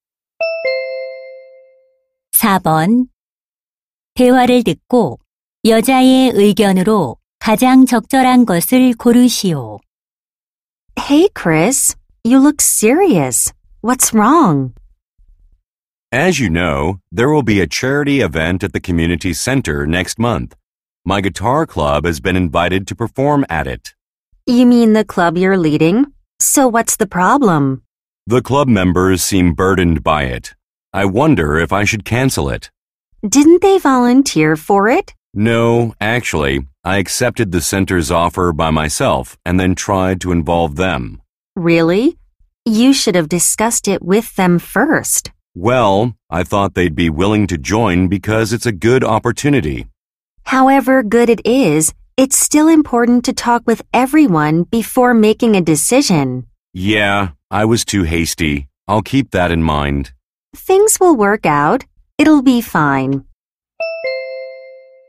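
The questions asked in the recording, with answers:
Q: 대화를 듣고 여자의 의견으로 가장 적절한 것을 고르시오.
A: 결정하기 전에 구성원들과 먼저 상의해야 한다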